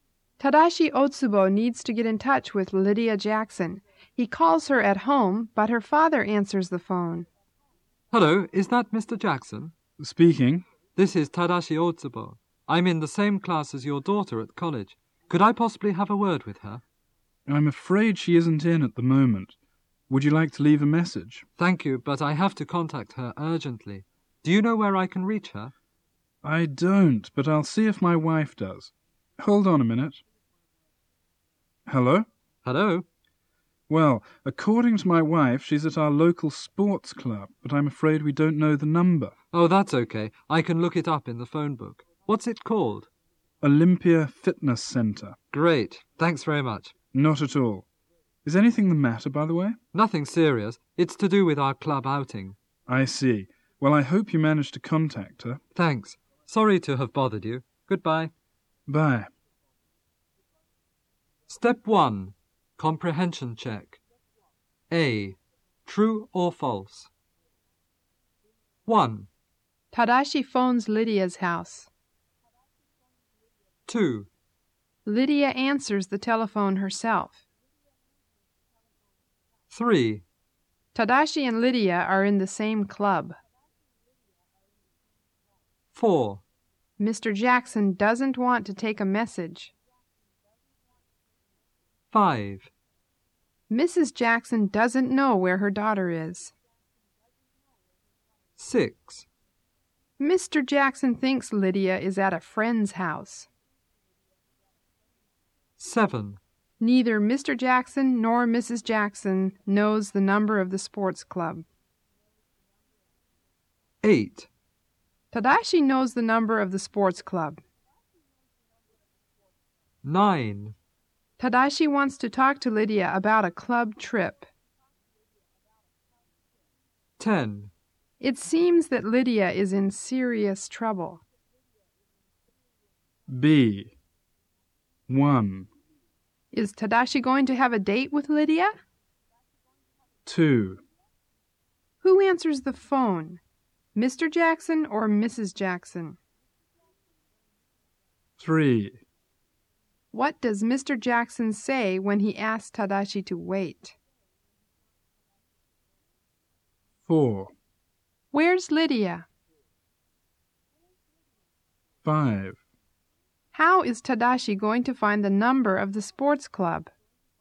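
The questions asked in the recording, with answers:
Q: Tadashi phones Lydia's house.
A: True

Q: Lydia answers the telephone herself.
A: False

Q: Mr. Jackson doesn't want to take a message.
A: False

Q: Mrs. Jackson doesn't know where her daughter is.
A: False

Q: Mr. Jackson thinks Lydia is at a friend's house.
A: False

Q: Neither Mr. Jackson nor Mrs. Jackson knows the number of the sports club.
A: True

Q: Tadashi knows the number of the sports club.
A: False

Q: Tadashi wants to talk to Lydia about a club trip.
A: True

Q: It seems that Lydia is in serious trouble.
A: False

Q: Is Tadashi going to have a date with Lydia?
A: No, he wants to talk about their club outing.

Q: Who answers the phone? Mr. Jackson or Mrs. Jackson?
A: Mr. Jackson

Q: What does Mr. Jackson say when he asks Tadashi to wait?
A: Hold on a minute.

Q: Where's Lydia?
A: At the local sports club, Olympia Fitness Center.

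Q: How is Tadashi going to find the number of the sports club?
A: He will look it up in the phone book.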